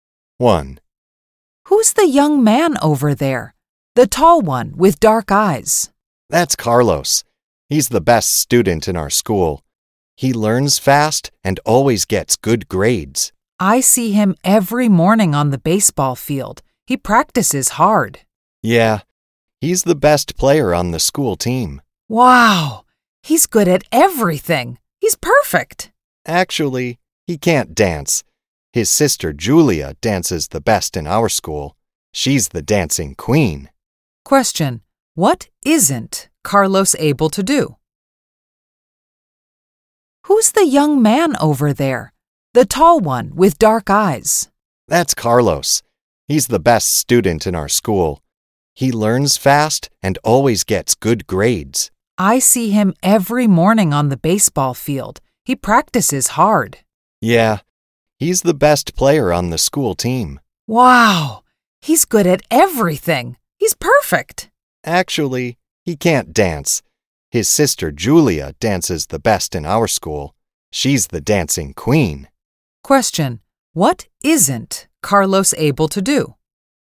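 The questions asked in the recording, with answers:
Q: Question, what isn't Carlos able to do?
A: Dance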